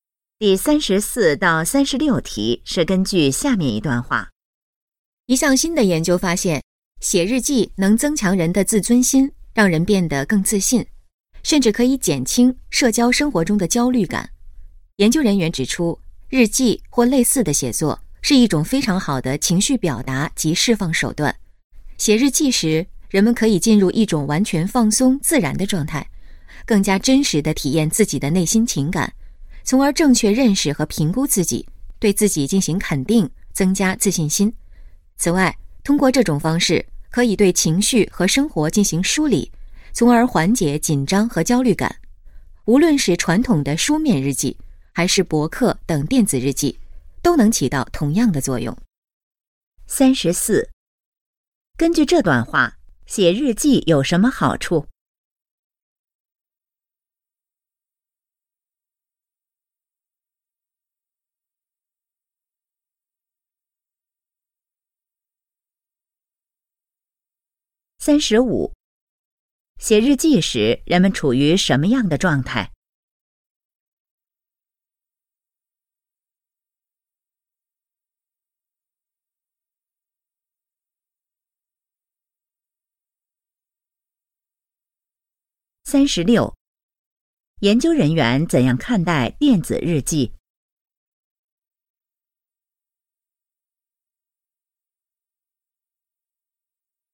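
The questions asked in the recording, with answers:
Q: 根据这段话,写日记有什么好处?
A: 增强自尊心和自信,减轻焦虑

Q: 写日记时人们处于什么样的状态?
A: 完全放松自然的状态

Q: 研究人员怎样看待电子日记?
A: 和书面日记作用一样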